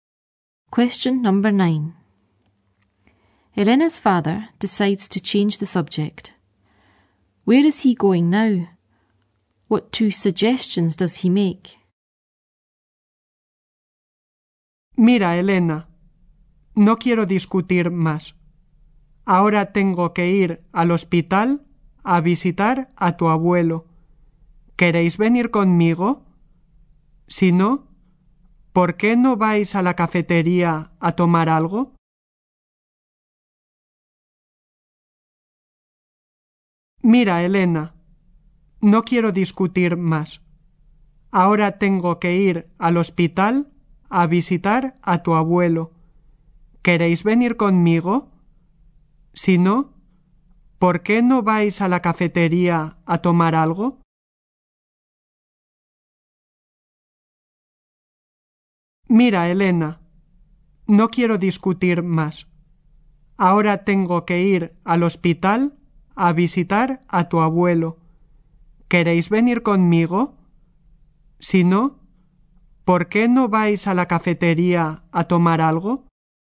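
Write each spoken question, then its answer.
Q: Where is he going now?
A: To the hospital to visit grandfather

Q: What two suggestions does he make?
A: Come with him, or go to the café for something to eat/drink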